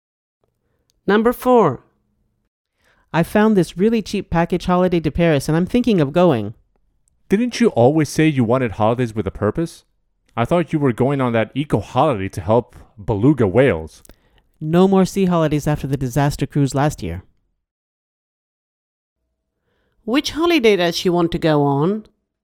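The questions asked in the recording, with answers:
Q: Which holiday does she want to go on?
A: The cheap package holiday to Paris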